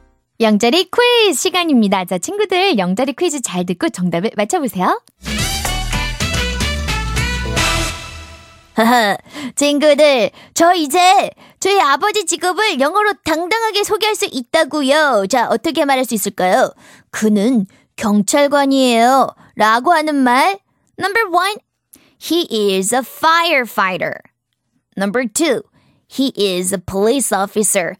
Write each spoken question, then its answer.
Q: 자, 어떻게 말할 수 있을까요? 그는 경찰관이에요.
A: 경찰관은 영어로 police officer 이라고 하니까 정답은 2번이 되겠네요.